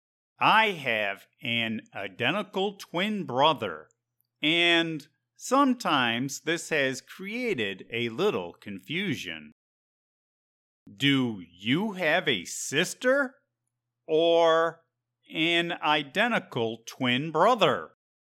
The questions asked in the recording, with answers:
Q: Do you have a sister or an identical twin brother?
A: I have an identical twin brother.